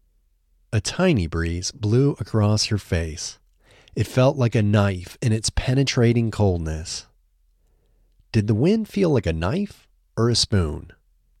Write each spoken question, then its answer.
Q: Did the wind feel like a knife or a spoon?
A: The wind felt like a knife.